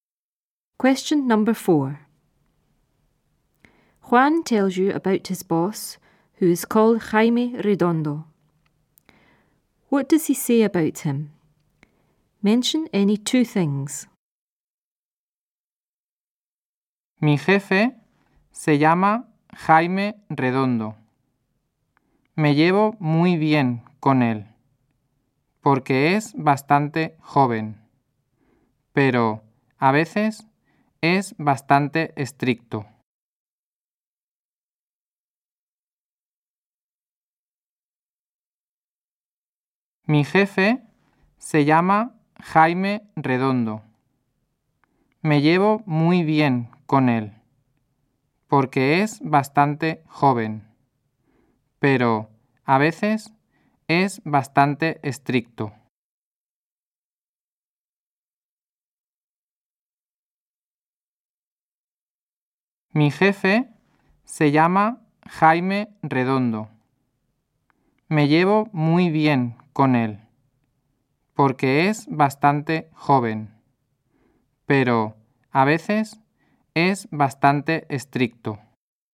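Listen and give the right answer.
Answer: He gets on well with him; he is quite young; sometimes quite strict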